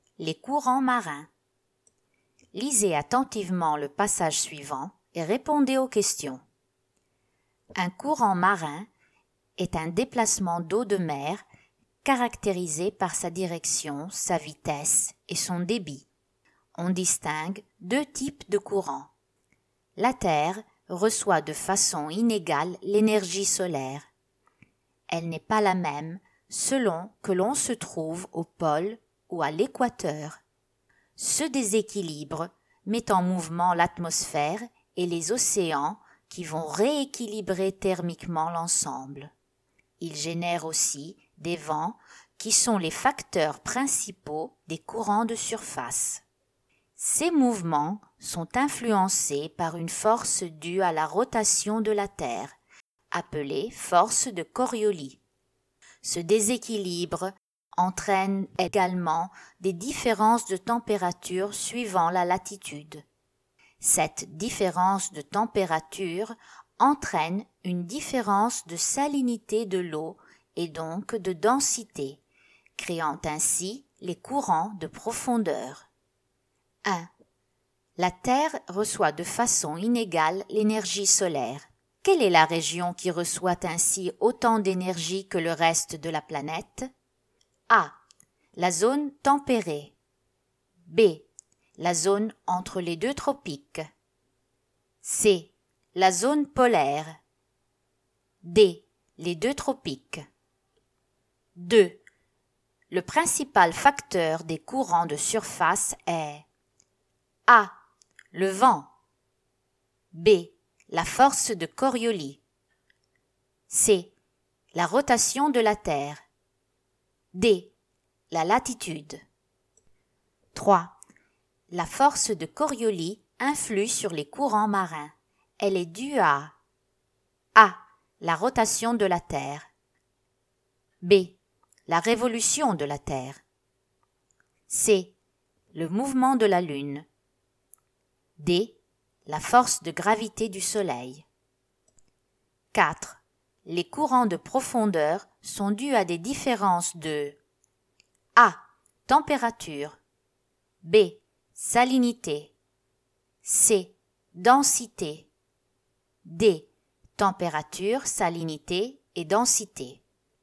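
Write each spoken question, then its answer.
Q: Le principal facteur des courants de surface est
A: A: Le vent.

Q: La force de Coriolis influe sur les courants marins. Elle est due à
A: A: La rotation de la Terre.

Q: Les courants de profondeur sont dus à des différences de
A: D: Température, salinité et densité.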